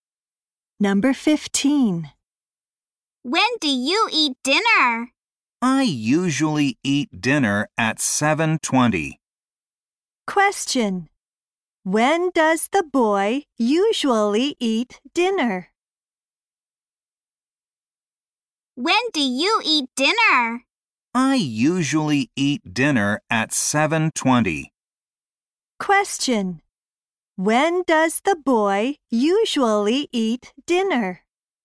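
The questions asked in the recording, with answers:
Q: When does the boy usually eat dinner?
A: At 7:20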